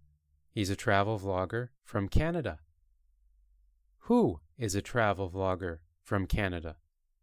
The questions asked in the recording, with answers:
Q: Who is a travel vlogger from Canada?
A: Travis.